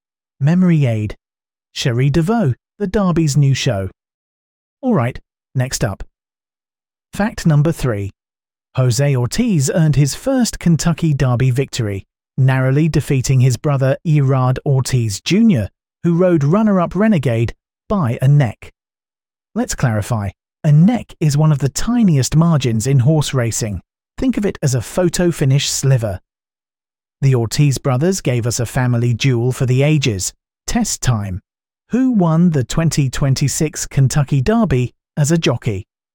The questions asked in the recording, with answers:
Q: Who won the 2026 Kentucky Derby as a jockey?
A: Correct answer, Jose Ortiz.